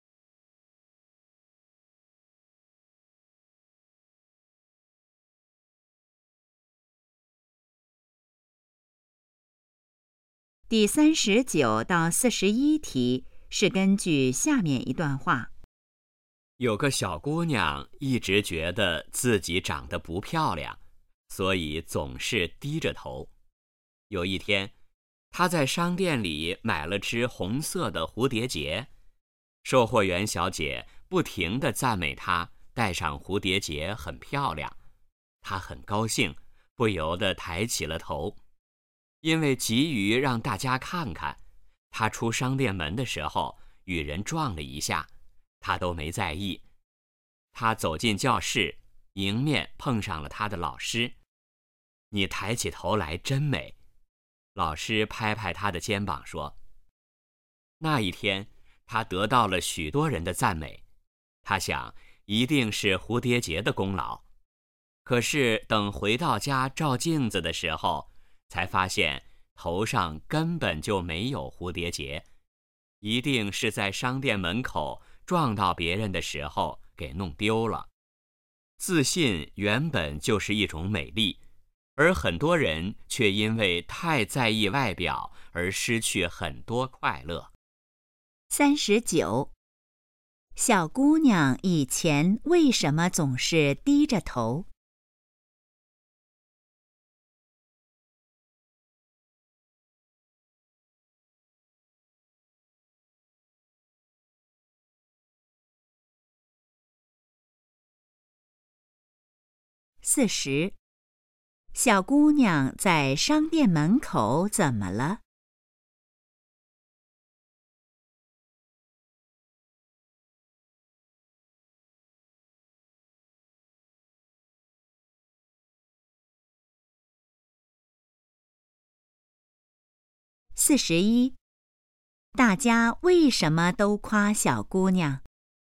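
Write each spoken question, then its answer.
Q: 小姑娘以前为什么总是低着头?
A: 觉得自己长得不漂亮

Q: 小姑娘在商店门口怎么了?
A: 与人撞了一下,蝴蝶结弄丢了

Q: 大家为什么都夸小姑娘?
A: 她抬起头来很自信、很美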